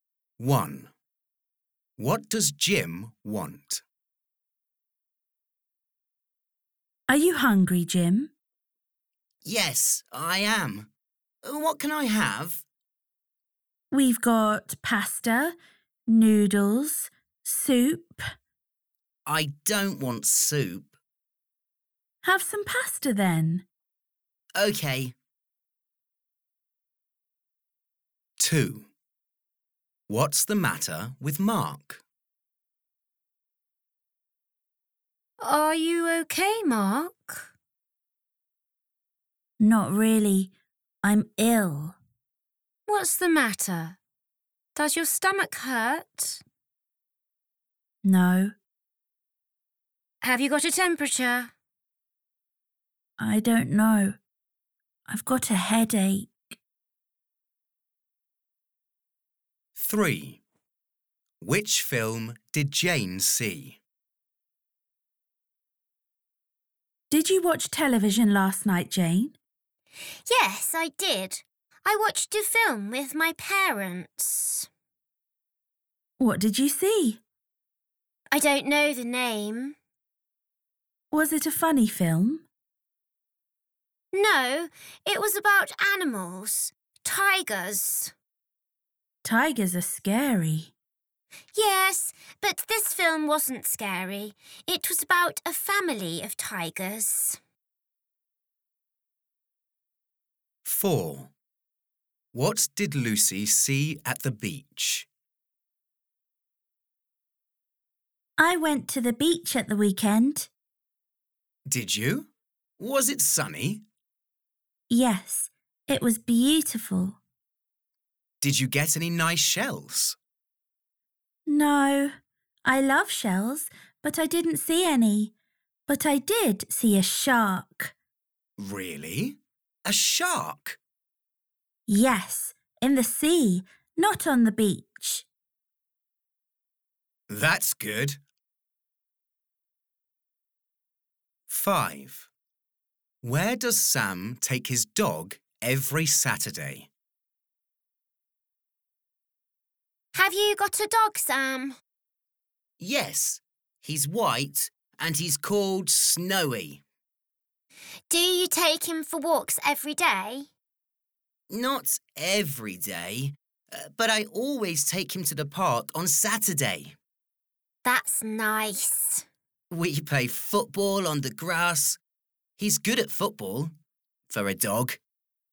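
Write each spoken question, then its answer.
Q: What does Jim want?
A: Pasta

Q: What's the matter with Mark?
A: He's got a headache

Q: Which film did Jane see?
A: A film about a family of tigers

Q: What did Lucy see at the beach?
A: A shark

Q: Where does Sam take his dog every Saturday?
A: To the park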